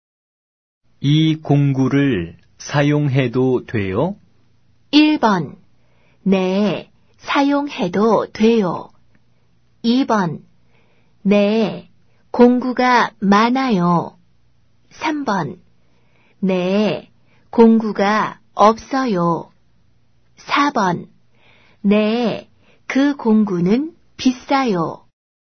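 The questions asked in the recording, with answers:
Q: 이 공구를 사용해도 돼요?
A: 1: 네, 사용해도 돼요.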